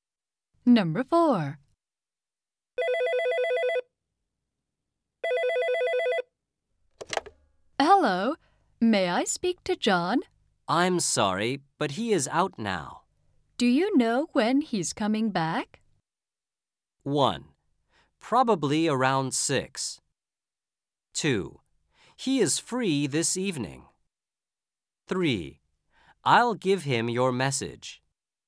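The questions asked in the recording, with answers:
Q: Do you know when he's coming back?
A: 1: Probably around 6.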